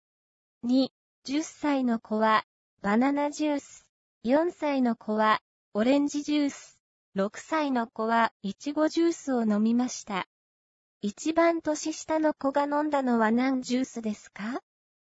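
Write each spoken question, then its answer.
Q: 一番年下の子が飲んだのは何ジュースですか?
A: オレンジジュース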